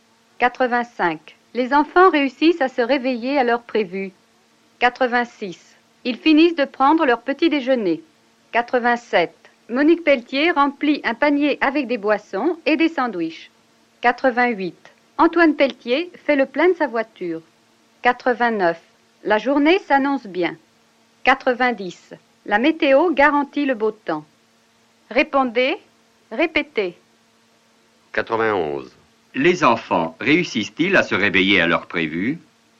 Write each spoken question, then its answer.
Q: Les enfants réussissent-ils à se réveiller à l'heure prévue?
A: Oui, les enfants réussissent à se réveiller à l'heure prévue.